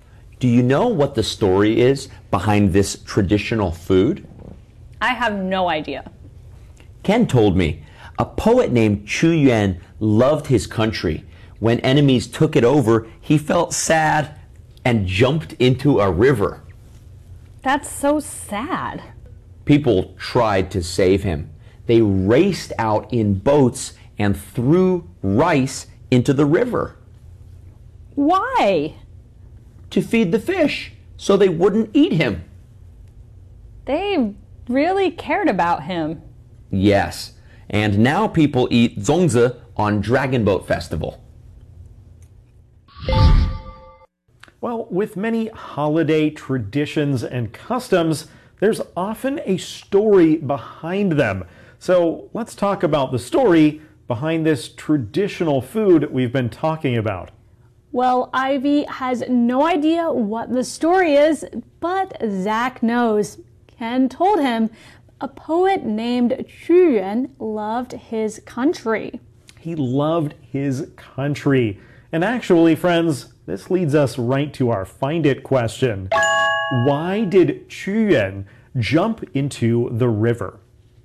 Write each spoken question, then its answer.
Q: Why did Chu Yuan jump into the river?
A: he felt sad because his enemies took over the country.